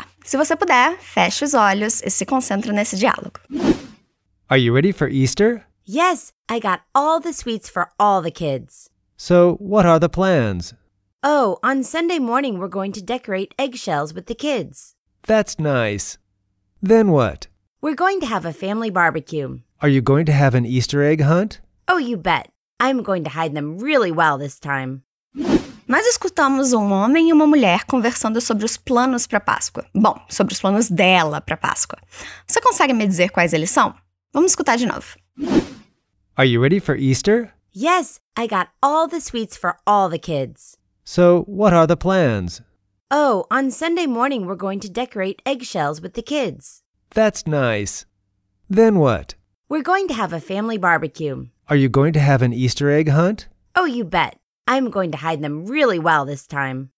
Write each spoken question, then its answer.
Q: Você consegue me dizer quais eles são?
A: Ela vai decorar cascas de ovos com as crianças e fazer um churrasco com a família.